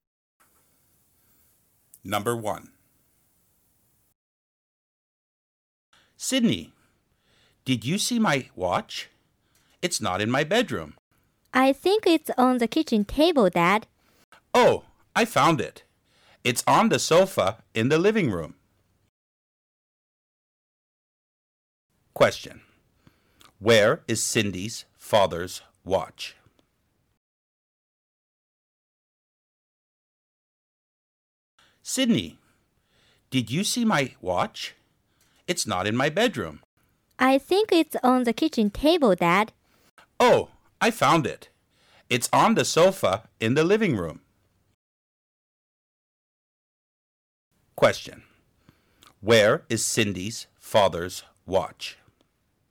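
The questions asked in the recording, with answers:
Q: Question. Where is Cindy's father's watch?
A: On the sofa in the living room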